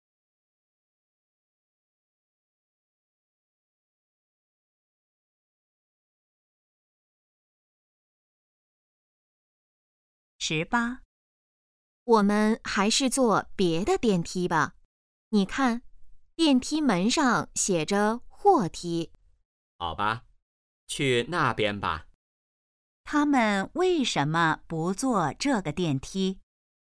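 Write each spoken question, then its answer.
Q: 他们为什么不坐这个电梯?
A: 那是货梯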